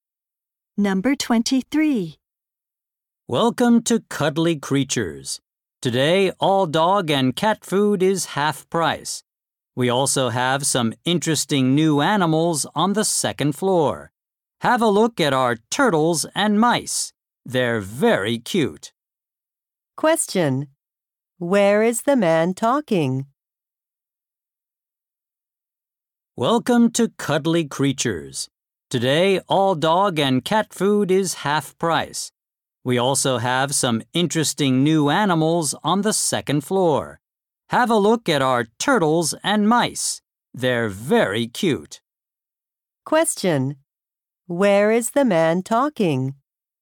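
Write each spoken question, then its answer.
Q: Where is the man talking?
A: At a pet shop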